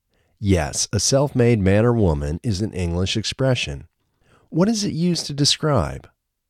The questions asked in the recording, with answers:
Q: What is it used to describe?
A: It's used to describe a person who has reached the highest levels of success without help from others.